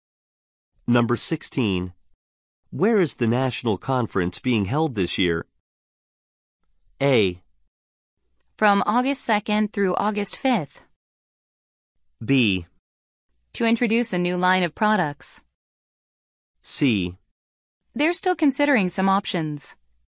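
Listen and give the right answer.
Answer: C: They're still considering some options.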